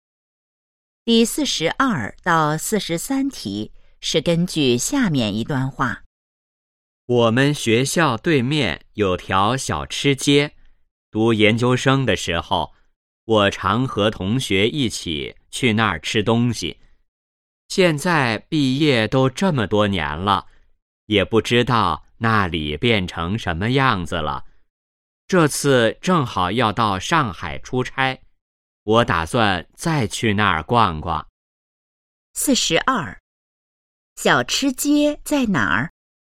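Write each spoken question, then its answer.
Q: 小吃街在哪儿?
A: 学校对面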